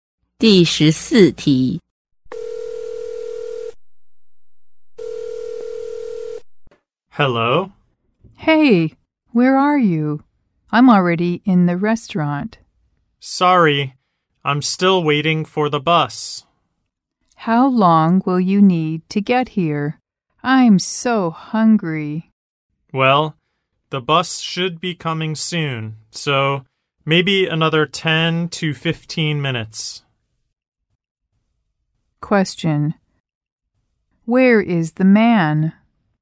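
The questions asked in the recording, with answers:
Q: Where is the man?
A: At the bus stop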